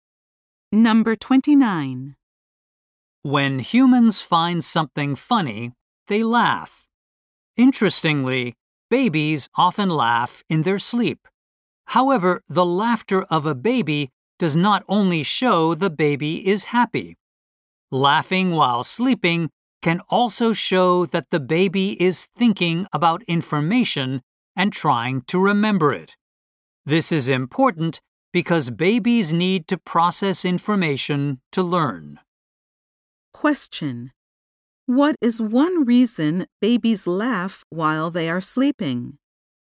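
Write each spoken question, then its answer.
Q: What is one reason babies laugh while they are sleeping?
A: They are processing and trying to remember information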